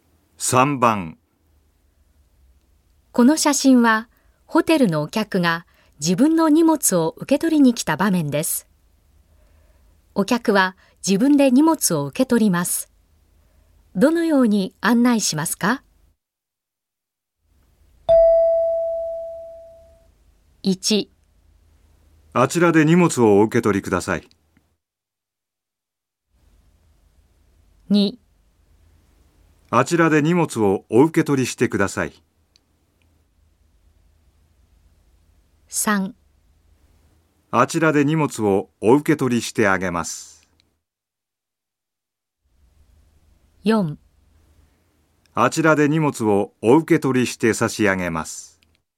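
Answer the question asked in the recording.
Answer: 1: あちらで荷物をお受け取りください。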